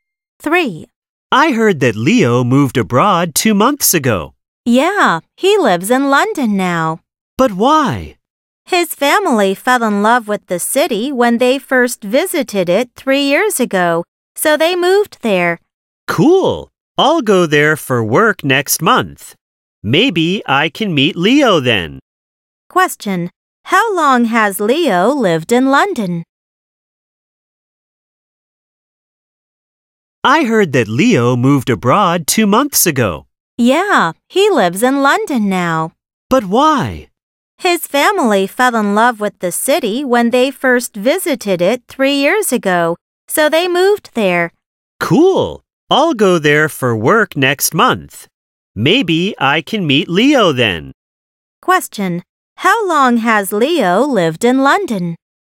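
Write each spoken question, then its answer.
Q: Question. How long has Leo lived in London?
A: For 2 months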